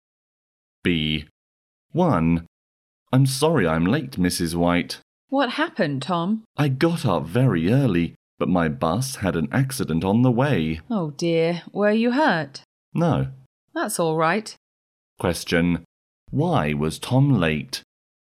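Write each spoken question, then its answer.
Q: Why was Tom late?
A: His bus had an accident on the way.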